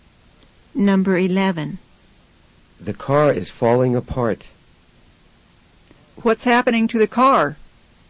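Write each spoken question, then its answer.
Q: What's happening to the car?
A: It is breaking down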